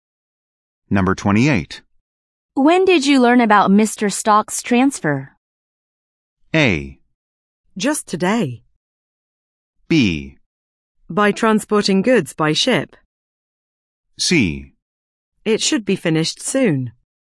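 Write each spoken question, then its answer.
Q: When did you learn about Mr.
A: A: Just today.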